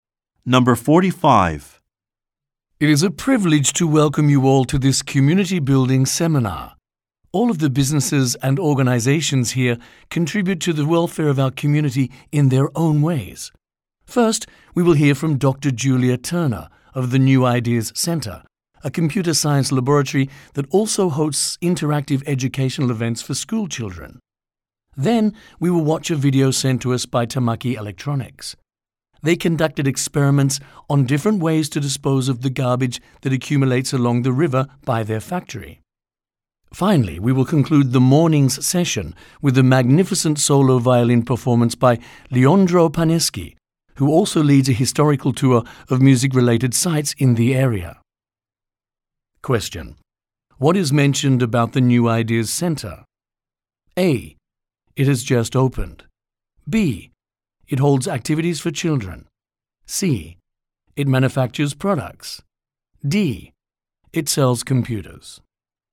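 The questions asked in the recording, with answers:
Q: what is mentioned about the New Ideas Center?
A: B: It holds activities for children.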